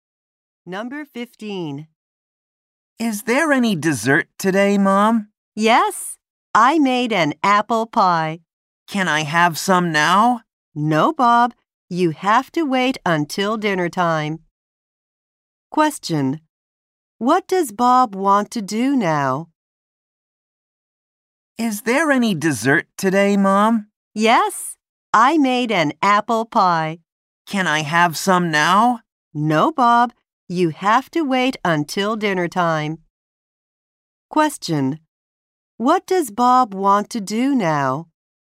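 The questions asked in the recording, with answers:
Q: What does Bob want to do now?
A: Eat some apple pie.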